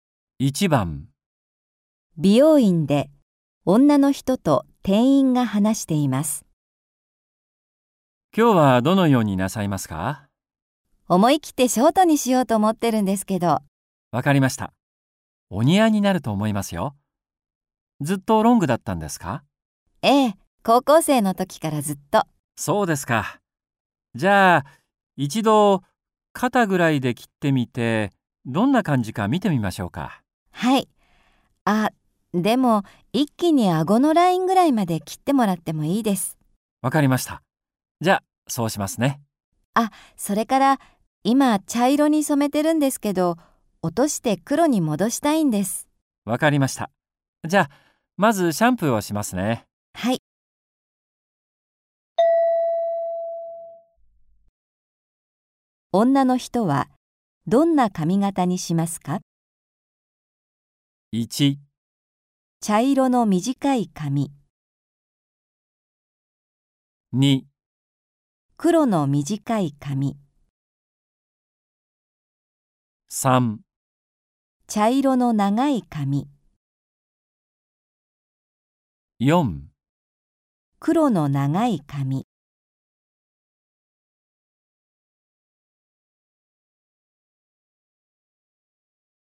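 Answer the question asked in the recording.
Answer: 2: 黒の短い髪。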